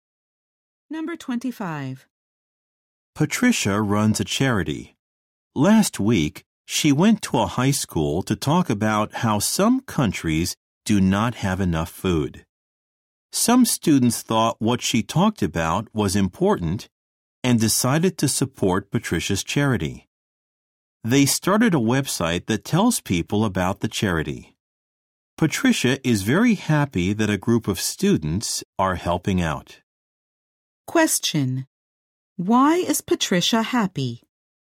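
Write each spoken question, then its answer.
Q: Why is Patricia happy?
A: Students are helping her charity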